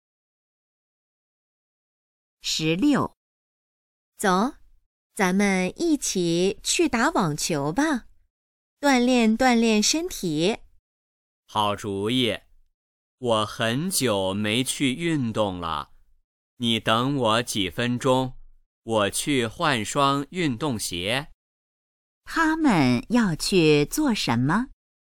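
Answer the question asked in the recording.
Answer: 打网球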